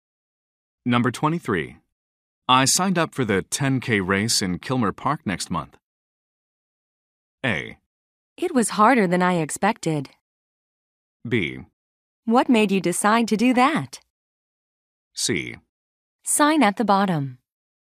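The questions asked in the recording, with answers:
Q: I signed up for the 10K race in Kilmer Park next month.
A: B: What made you decide to do that?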